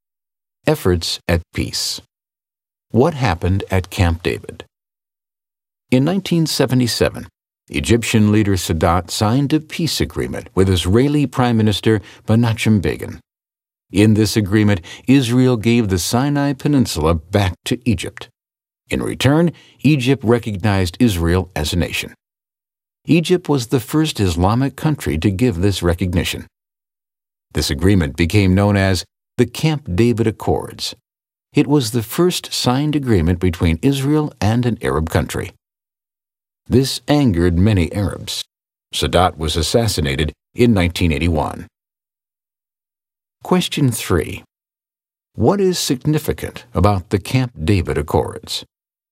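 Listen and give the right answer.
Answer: It was the first signed agreement between Israel and an Arab country; Egypt recognized Israel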